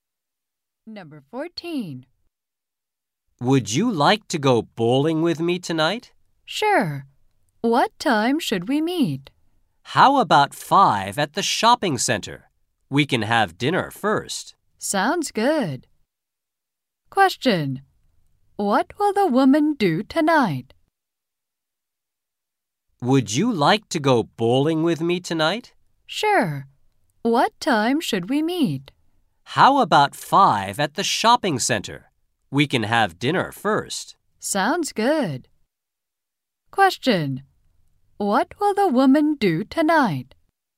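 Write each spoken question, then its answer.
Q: What will the woman do tonight?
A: Go bowling (and have dinner first)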